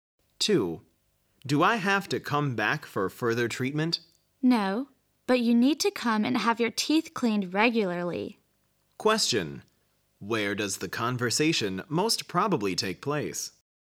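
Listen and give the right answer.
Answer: At a dentist's office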